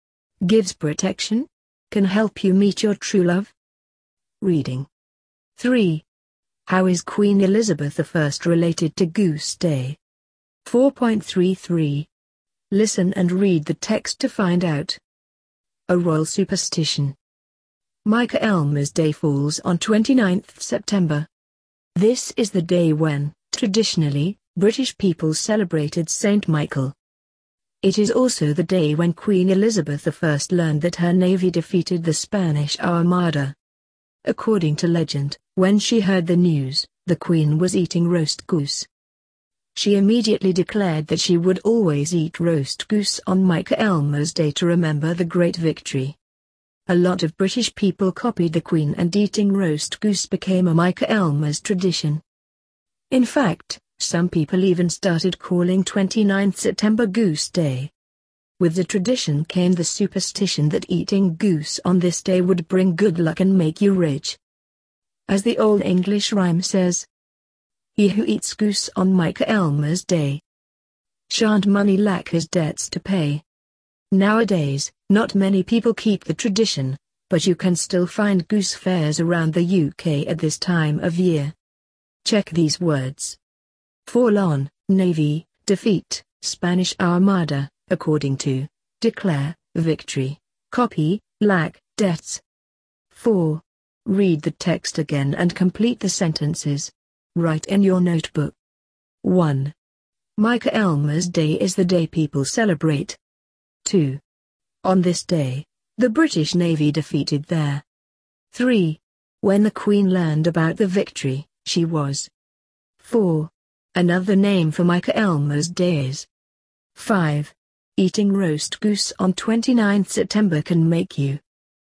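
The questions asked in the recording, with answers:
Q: How is Queen Elizabeth I related to Goose Day?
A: She was eating roast goose when she heard her navy had defeated the Spanish Armada, and declared she would always eat goose on Michaelmas Day

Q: Michaelmas Day is the day people celebrate.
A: Saint Michael

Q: On this day, the British Navy defeated there.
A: the Spanish Armada

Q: When the Queen learned about the victory, she was.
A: eating roast goose

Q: Another name for Michaelmas Day is.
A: Goose Day

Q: Eating roast goose on 29th September can make you.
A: rich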